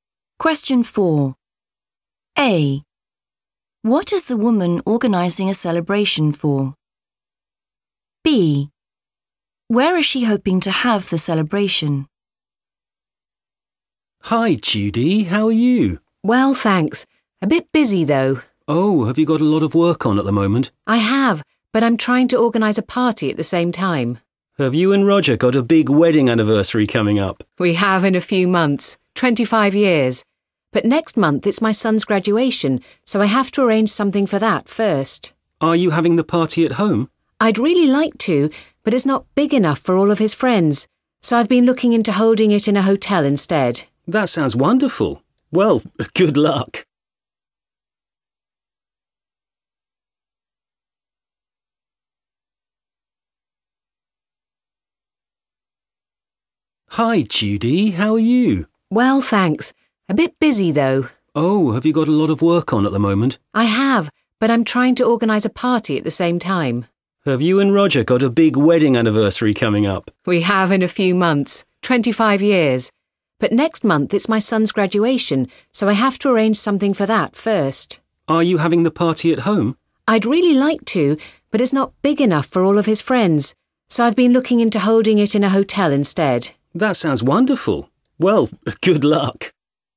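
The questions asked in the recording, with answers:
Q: What is the woman organising a celebration for?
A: her son's graduation

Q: Where is she hoping to have the celebration?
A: in a hotel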